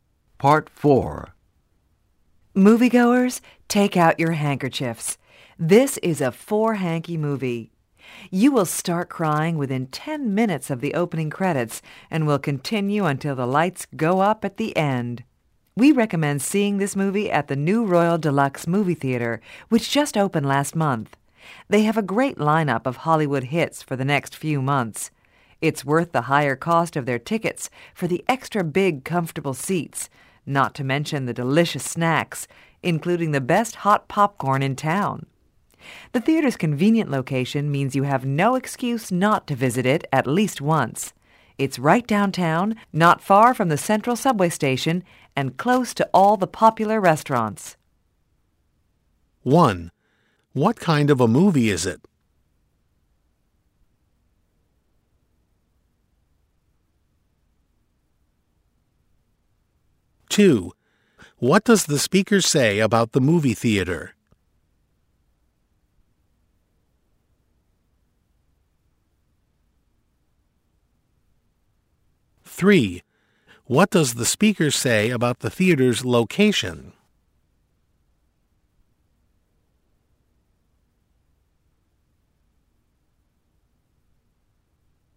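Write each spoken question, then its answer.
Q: What kind of a movie is it?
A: A very sad movie that will make you cry.

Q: What does the speaker say about the movie theater?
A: It's new and worth the higher ticket price, with big comfortable seats and great snacks.

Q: What does the speaker say about the theater's location?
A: It's convenient: downtown, near the central subway station and popular restaurants.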